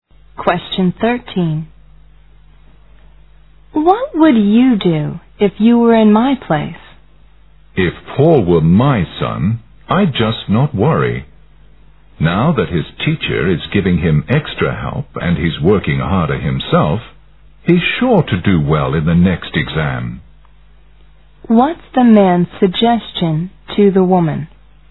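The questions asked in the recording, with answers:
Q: What's the man's suggestion to the woman?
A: Not to worry about Paul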